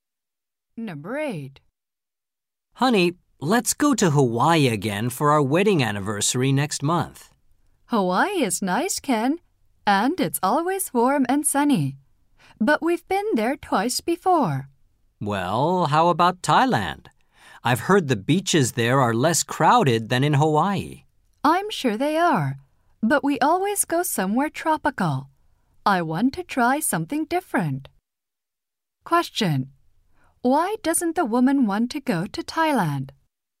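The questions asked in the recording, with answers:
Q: Why doesn't the woman want to go to Thailand?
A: She wants to go somewhere that isn't tropical, something different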